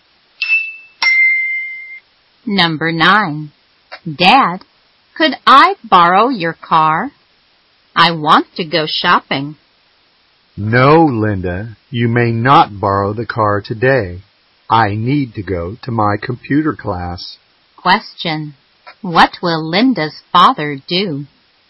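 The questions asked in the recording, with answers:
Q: Question. What will Linda's father do?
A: Go to his computer class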